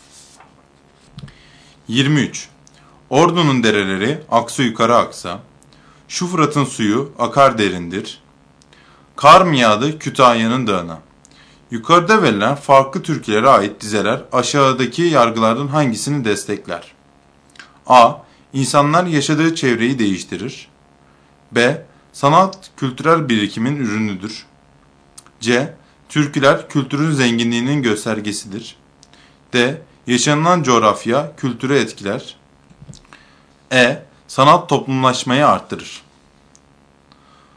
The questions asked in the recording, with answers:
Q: Yukarıda verilen farklı türkülere ait dizeler aşağıdaki yargılardan hangisini destekler?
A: Doğru cevap D şıkkı.